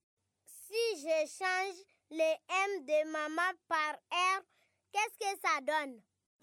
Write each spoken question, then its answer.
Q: Si je change le M de maman par R, qu'est-ce que ça donne?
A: C'est Raman.